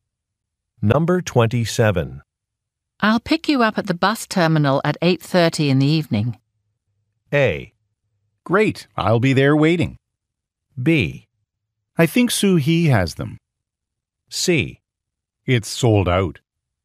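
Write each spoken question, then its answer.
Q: I'll pick you up at the bus terminal at 8:30 in the evening.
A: A: Great, I'll be there waiting.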